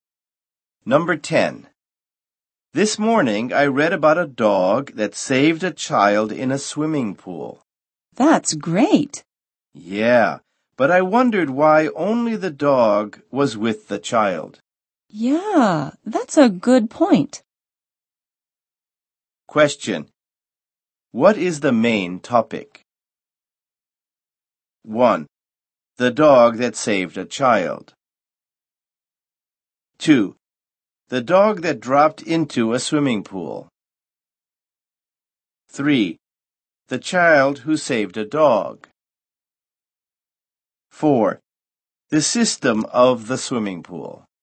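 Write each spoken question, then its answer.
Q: What is the main topic?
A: 1: The dog that saved a child.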